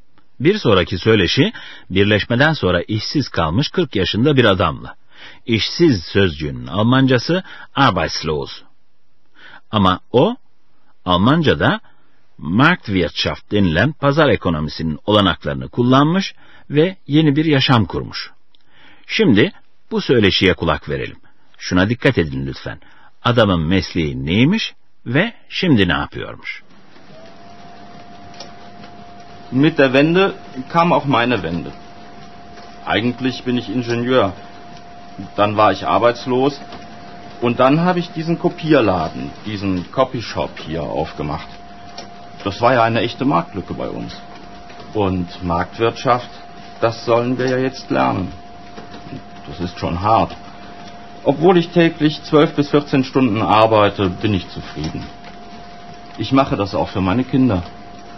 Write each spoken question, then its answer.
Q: Adamın mesleği neymiş ve şimdi ne yapıyormuş?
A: Adamın mesleği mühendislikmiş.